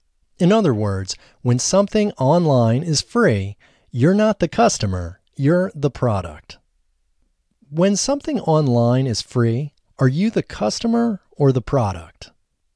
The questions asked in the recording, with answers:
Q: When something online is free, are you the customer or the product?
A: When something online is free, you're the product.